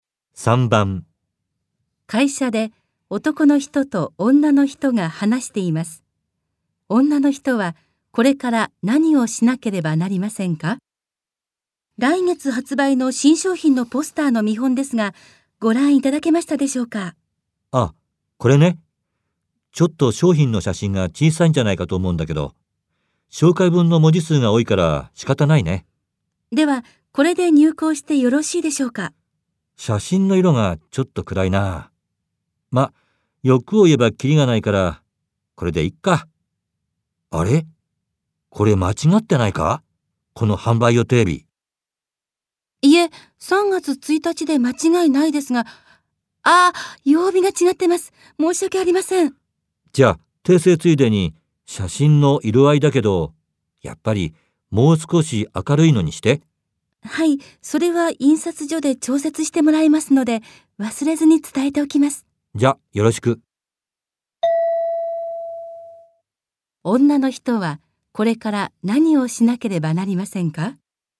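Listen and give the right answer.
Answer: ポスターの曜日を訂正し、写真を明るくするよう印刷所に伝える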